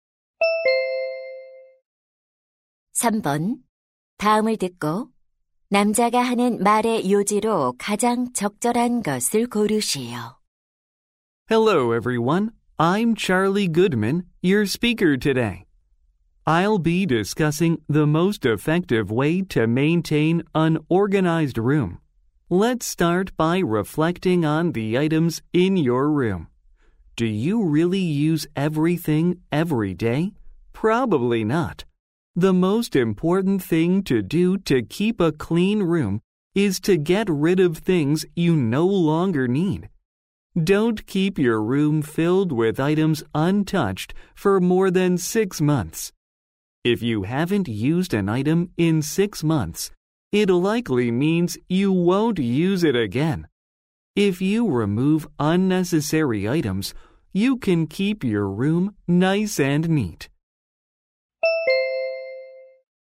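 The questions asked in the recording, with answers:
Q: 다음을 듣고 남자가 하는 말의 요지로 가장 적절한 것을 고르시오.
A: 방을 깨끗하게 유지하려면 더 이상 필요 없는 물건을 버려야 한다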